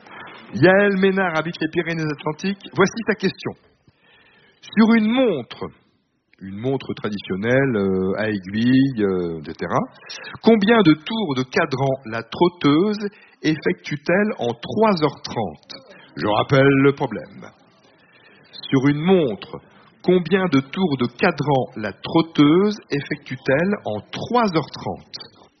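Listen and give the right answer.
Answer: 210 tours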